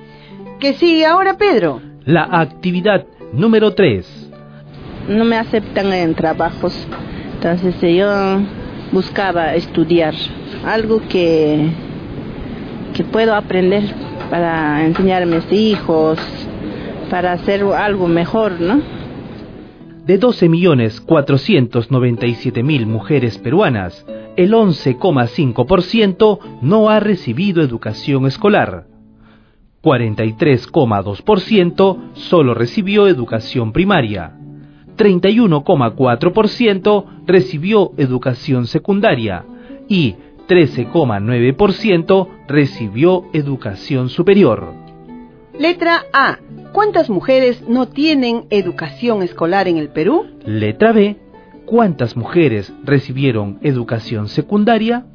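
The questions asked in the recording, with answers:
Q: ¿Cuántas mujeres no tienen educación escolar en el Perú?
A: 1.437.155 mujeres (11,5% de 12.497.000)

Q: ¿Cuántas mujeres recibieron educación secundaria?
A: 3.924.058 mujeres (31,4% de 12.497.000)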